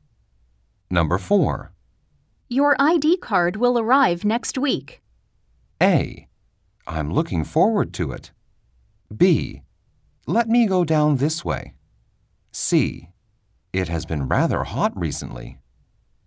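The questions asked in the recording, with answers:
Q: Your ID card will arrive next week.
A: A: I'm looking forward to it.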